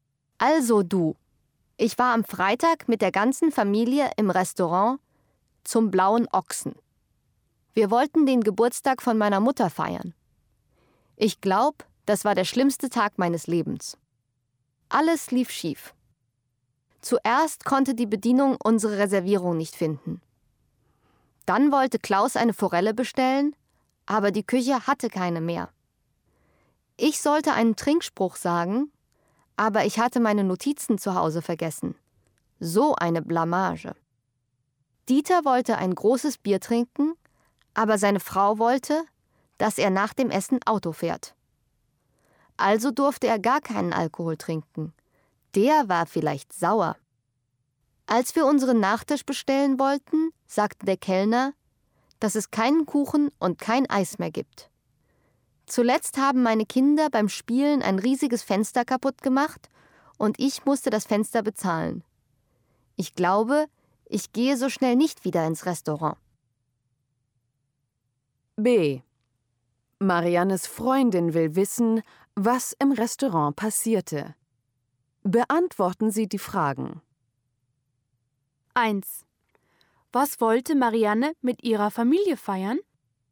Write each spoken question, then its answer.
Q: Was wollte Marianne mit ihrer Familie feiern?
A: Sie wollte den Geburtstag von ihrer Mutter feiern.